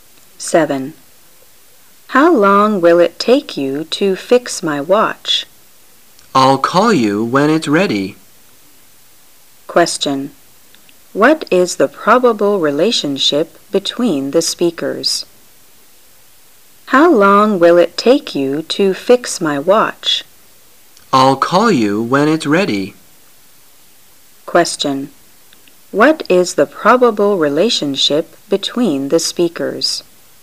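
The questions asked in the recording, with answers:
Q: What is the probable relationship between the speakers?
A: Customer and watch repairer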